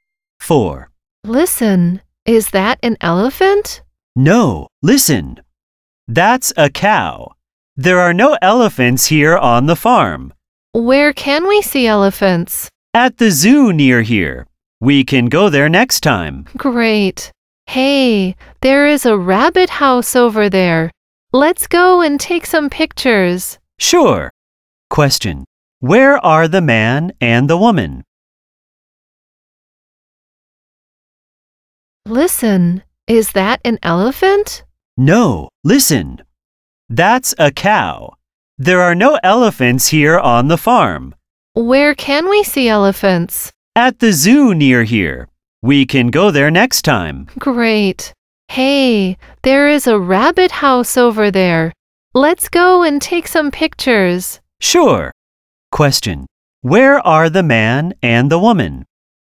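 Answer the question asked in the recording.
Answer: On a farm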